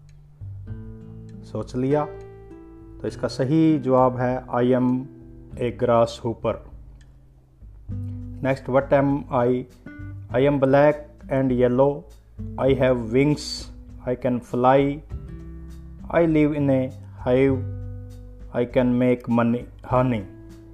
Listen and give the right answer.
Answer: I am a bee.